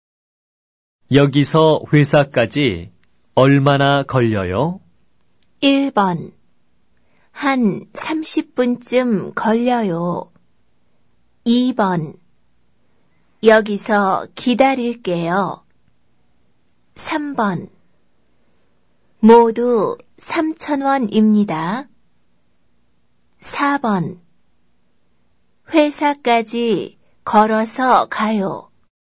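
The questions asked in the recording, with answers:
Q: 여기서 회사까지 얼마나 걸려요?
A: 1: 한 30분쯤 걸려요.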